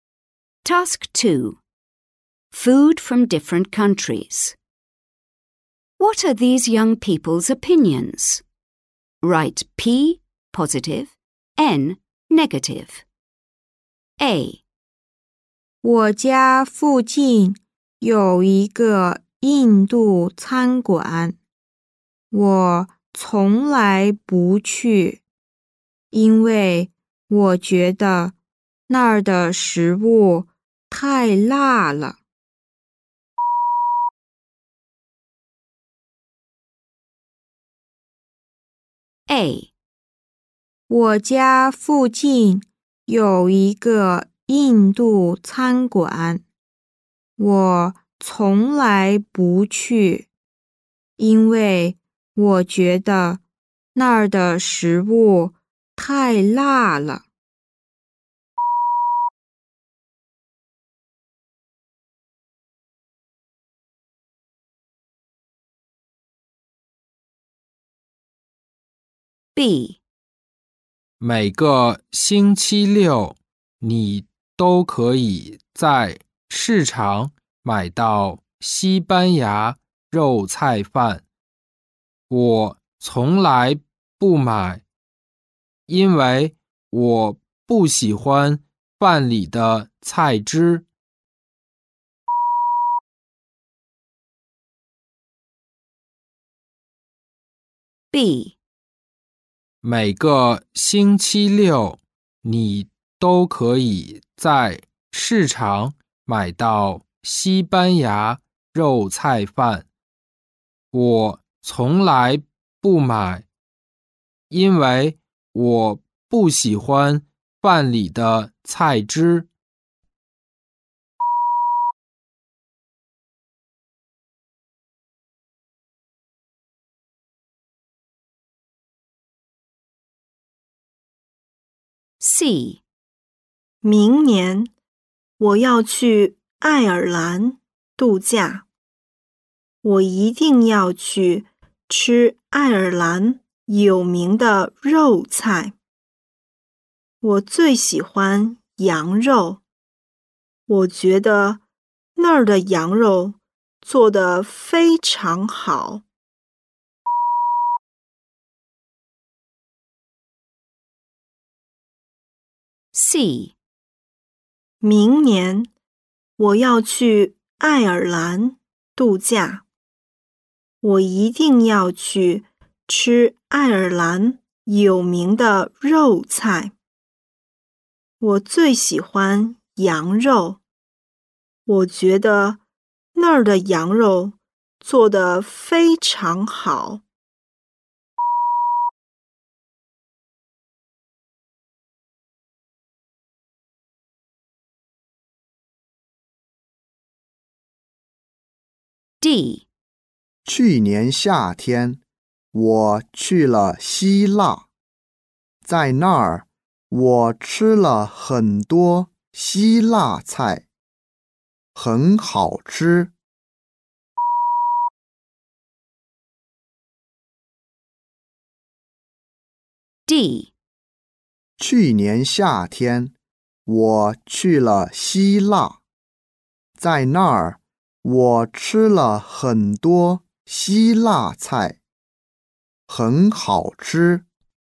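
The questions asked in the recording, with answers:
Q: What are these young people's opinions?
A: N (negative)

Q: What are these young people's opinions?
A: N (negative)

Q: What are these young people's opinions?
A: P (positive)

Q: What are these young people's opinions?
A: P (positive)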